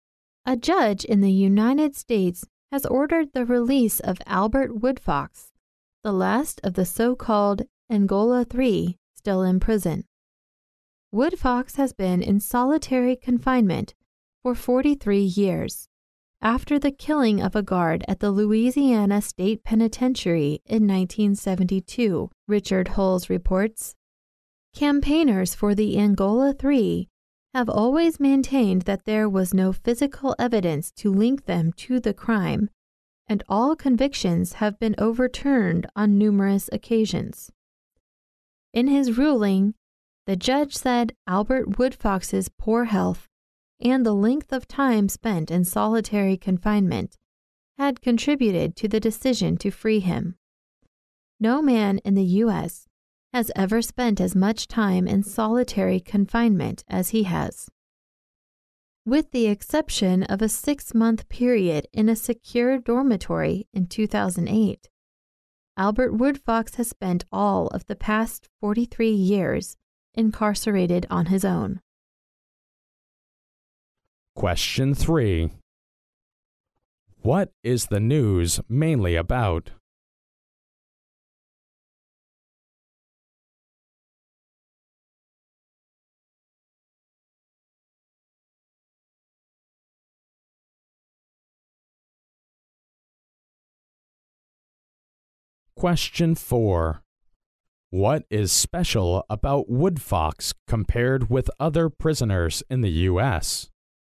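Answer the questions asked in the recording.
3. A US judge ordered the release of Albert Woodfox, the last of the Angola Three still in prison.
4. No man in the US has spent as much time in solitary confinement as he has (43 years).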